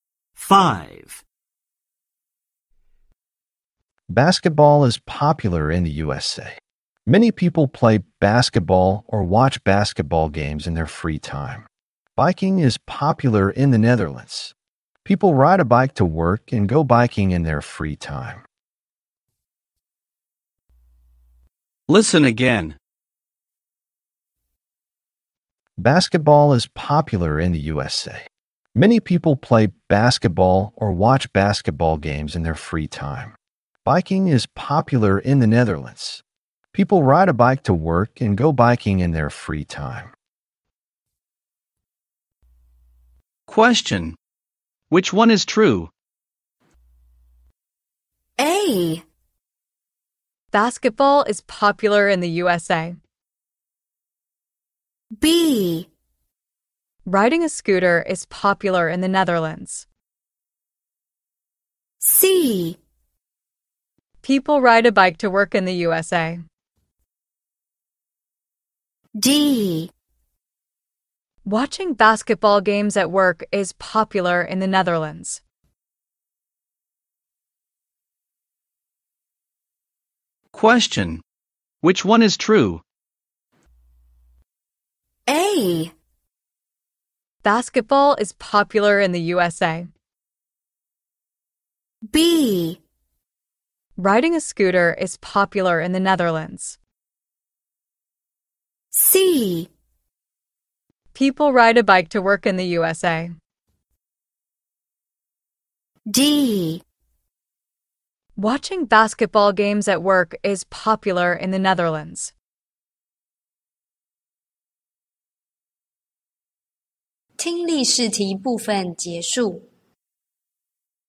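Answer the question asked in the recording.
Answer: A: Basketball is popular in the USA.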